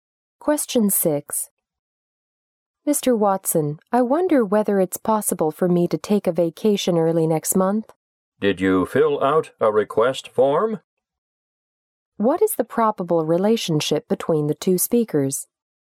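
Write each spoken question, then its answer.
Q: What is the probable relationship between the two speakers?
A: Employee and boss.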